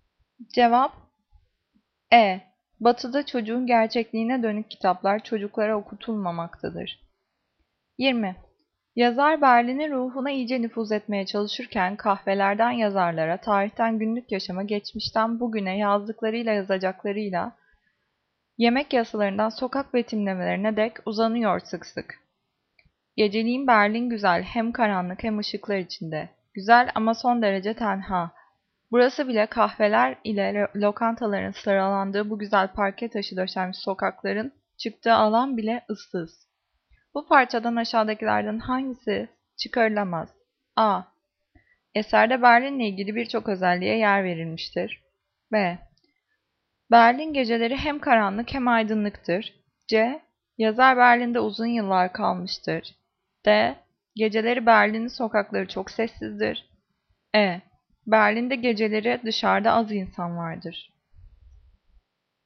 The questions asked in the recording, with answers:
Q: Bu parçadan aşağıdakilerden hangisi çıkarılamaz?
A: Cevap C. Yazar Berlin'de uzun yıllar kalmıştır.